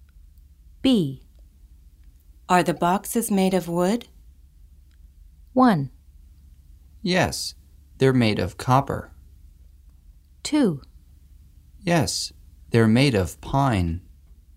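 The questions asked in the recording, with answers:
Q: Are the boxes made of wood?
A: 2: Yes, they're made of pine.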